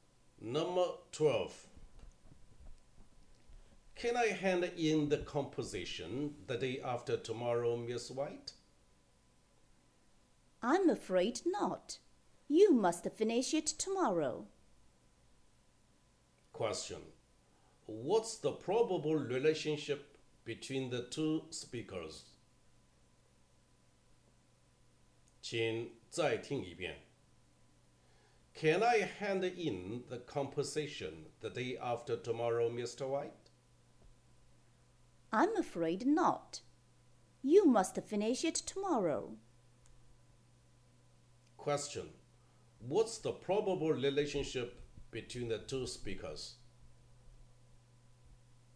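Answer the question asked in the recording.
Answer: Teacher and student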